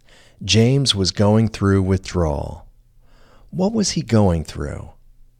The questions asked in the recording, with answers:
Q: What was he going through?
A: He was going through withdrawal.